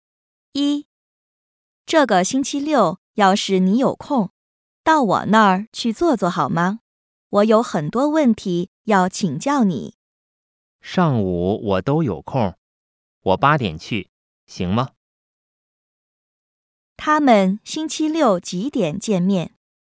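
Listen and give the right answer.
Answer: 8点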